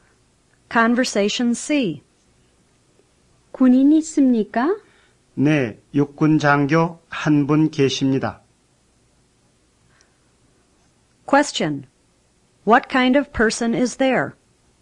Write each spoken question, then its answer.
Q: What kind of person is there?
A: 1 army officer.